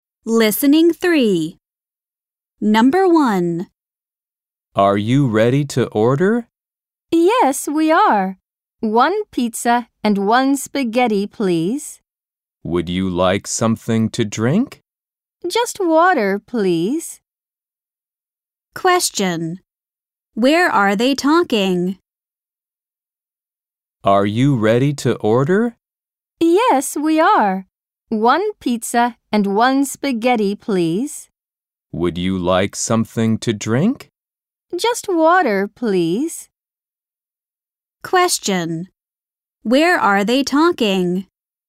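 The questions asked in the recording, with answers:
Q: Where are they talking?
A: In a restaurant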